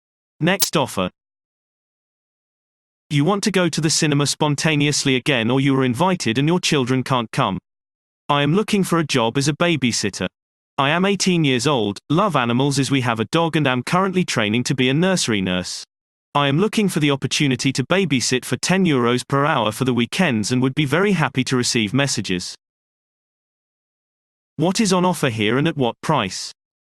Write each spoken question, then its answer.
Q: What is on offer here and at what price?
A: Response. Childcare is offered at weekends for €10 per hour.